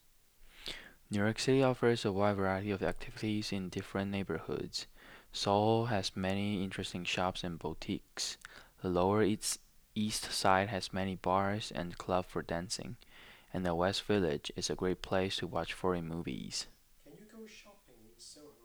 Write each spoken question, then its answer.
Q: Can you go shopping in Soho?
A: Yes, I can go shopping in Soho.